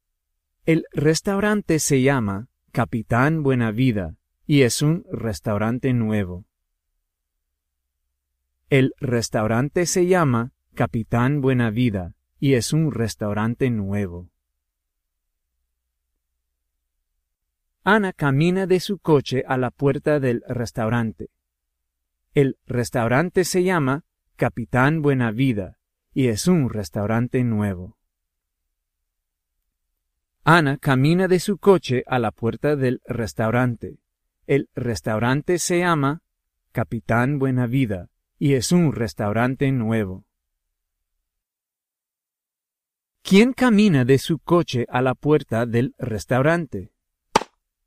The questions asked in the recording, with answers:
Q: ¿Quién camina de su coche a la puerta del restaurante?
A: Ana camina a la puerta del restaurante mexicano.